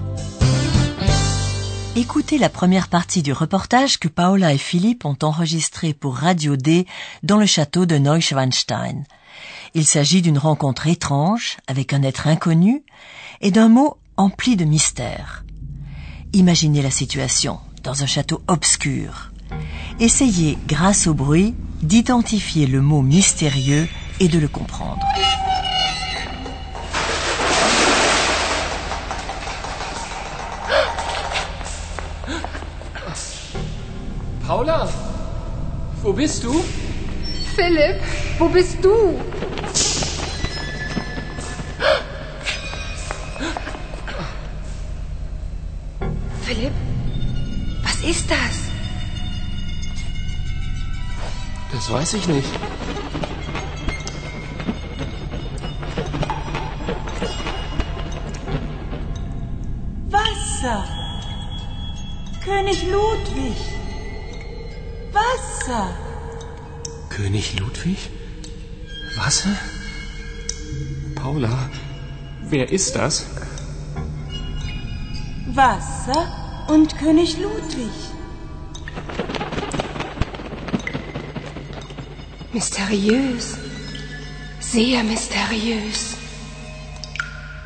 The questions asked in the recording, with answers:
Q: Essayez, grâce au bruit, d'identifier le mot mystérieux et de le comprendre.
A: Le mot mystérieux, chers auditeurs, était eau.